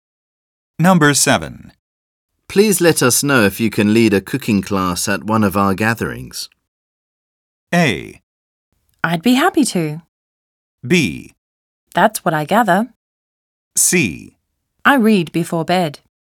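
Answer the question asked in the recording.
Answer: A: I'd be happy to.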